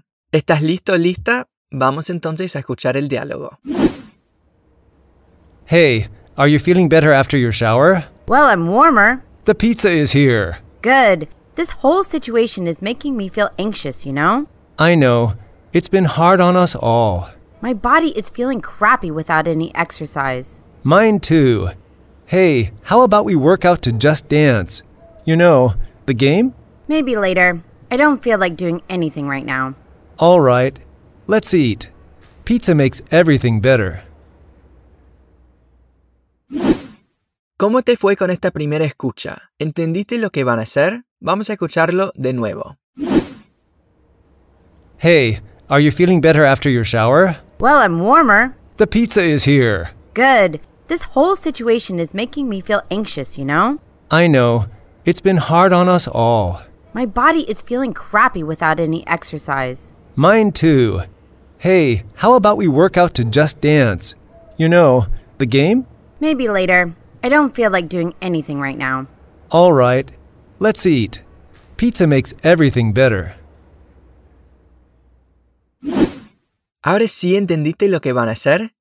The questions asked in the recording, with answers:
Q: Ahora sí entendiste lo que van a hacer?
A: Exactamente, van a comer pizza.